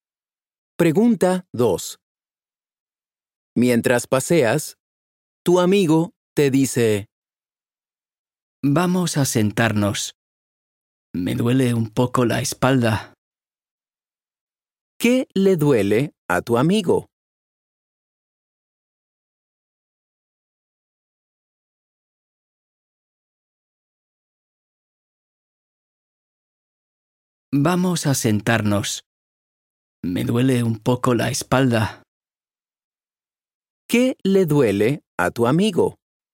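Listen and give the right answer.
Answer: La espalda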